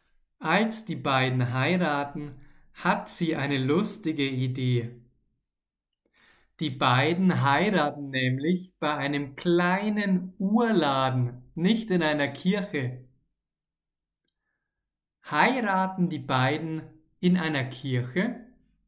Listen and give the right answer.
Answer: Nein,